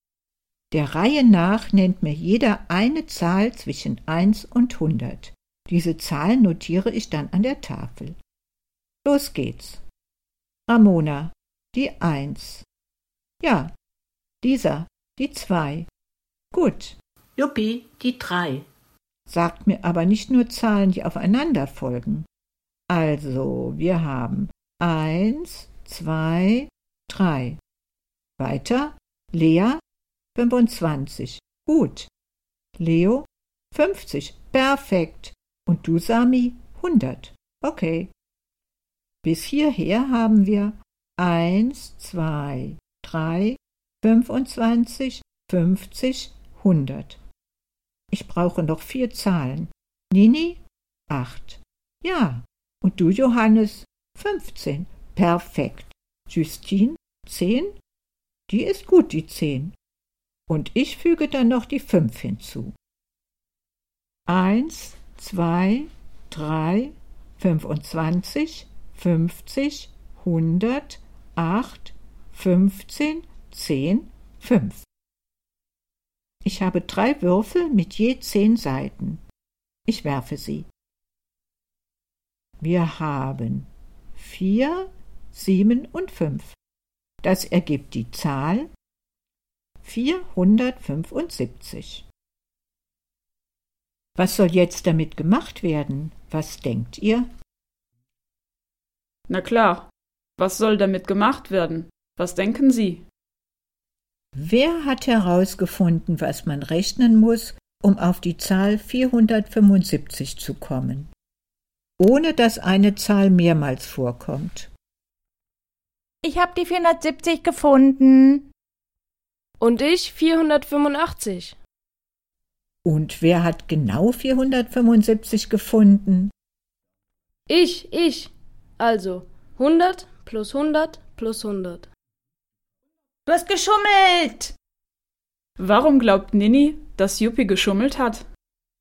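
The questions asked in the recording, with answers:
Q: Warum glaubt Nini, dass Juppi geschummelt hat?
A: Weil er die 100 mehrmals benutzt hat, obwohl keine Zahl mehrmals vorkommen darf.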